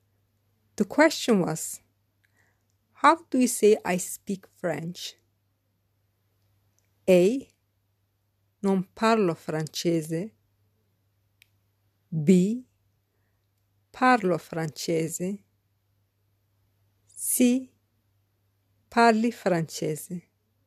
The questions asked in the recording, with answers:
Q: The question was, how do you say I speak French?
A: The correct answer is B. Parlo francese.